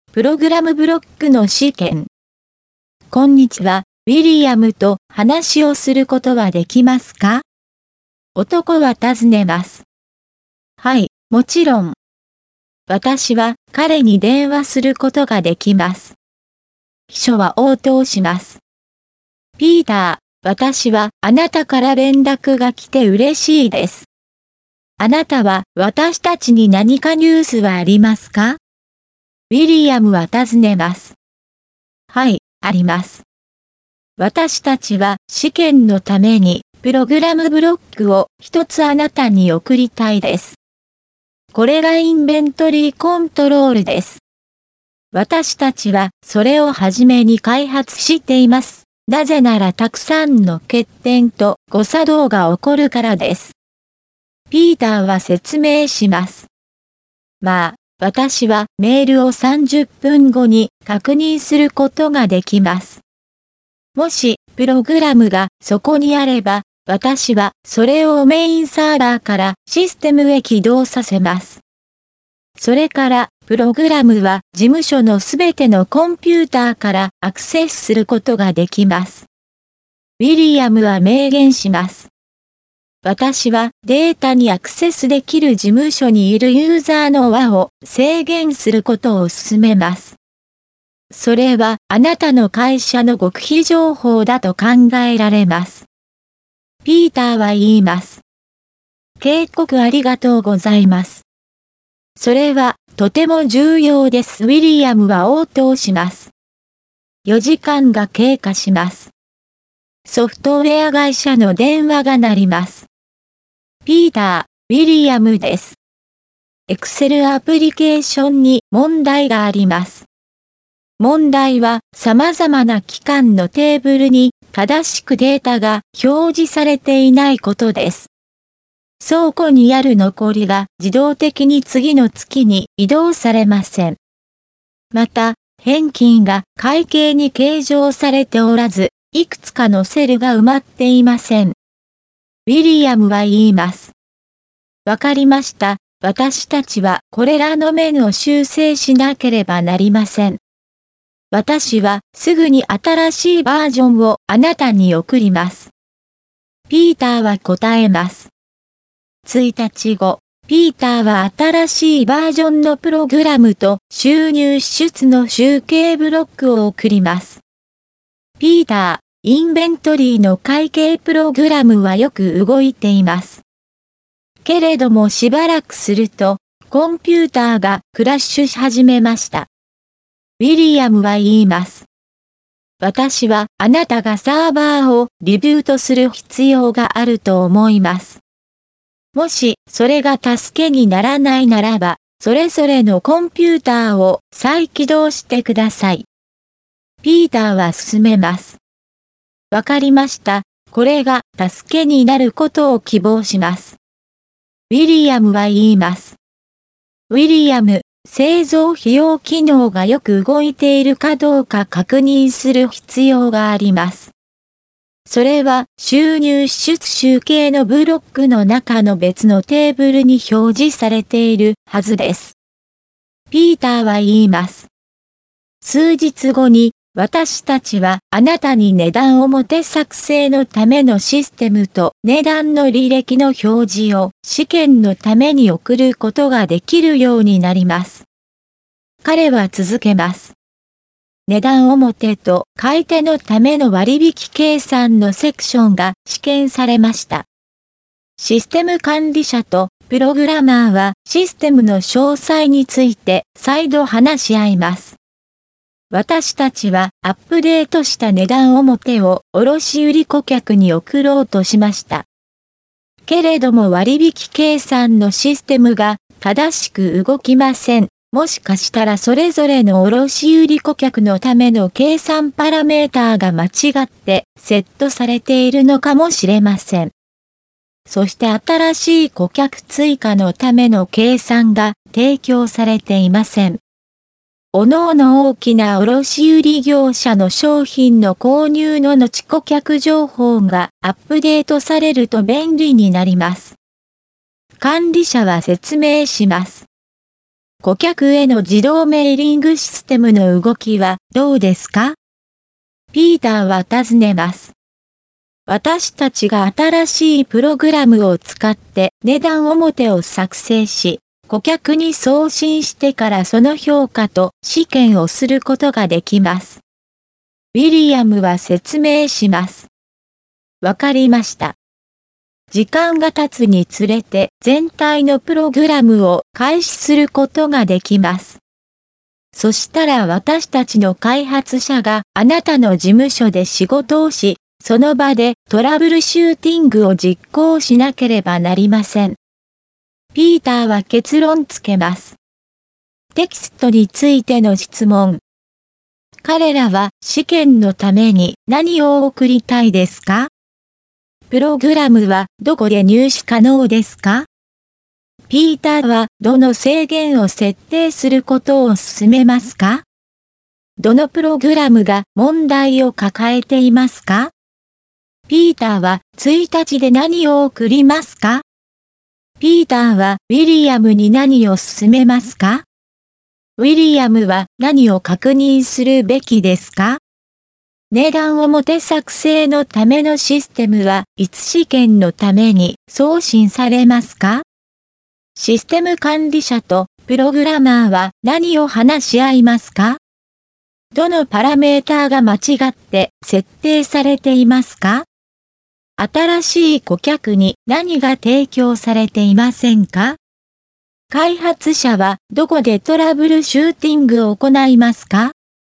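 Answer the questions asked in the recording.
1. プログラムブロック(インベントリーコントロール)
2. 事務所のすべてのコンピューター
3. データにアクセスできるユーザーの輪を制限すること
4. Excel アプリケーション
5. 新しいバージョンのプログラムと収入支出の集計ブロック
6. サーバーをリブートすること(だめなら各コンピューターを再起動)
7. 製造費用機能がよく動いているかどうか
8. 数日後
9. システムの詳細
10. それぞれの卸売顧客のための計算パラメーター
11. 新しい顧客追加のための計算
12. ウィリアムの事務所で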